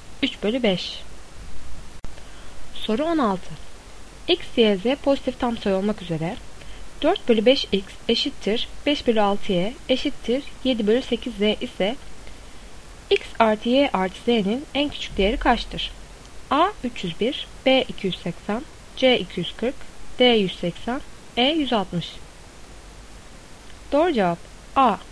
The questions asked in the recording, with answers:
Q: X, Y, Z pozitif tam sayı olmak üzere 4/5x eşittir 5/6y eşittir 7/8z ise x artı y artı z'nin en küçük değeri kaçtır?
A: Doğru cevap A.